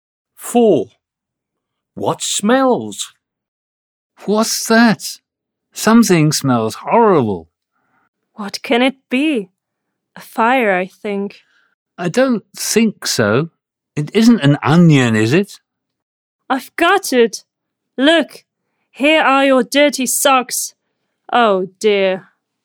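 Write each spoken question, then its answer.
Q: What smells?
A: Dirty socks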